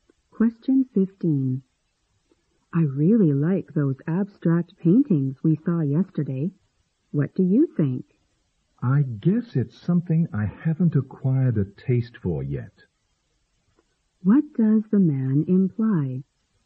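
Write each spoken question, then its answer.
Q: What does the man imply?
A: He doesn't appreciate abstract paintings yet.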